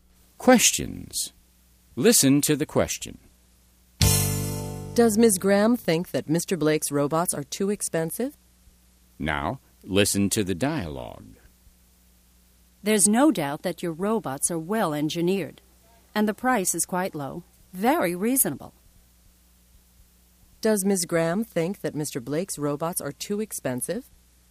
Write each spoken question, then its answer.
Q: Does Ms. Graham think that Mr. Blake's robots are too expensive?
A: No, she doesn't. She thinks the price of the robots is quite low.